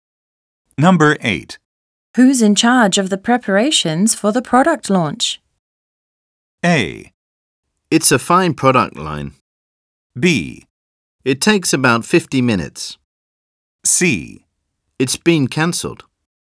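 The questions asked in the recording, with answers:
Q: Who's in charge of the preparations for the product launch?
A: C: It's been cancelled.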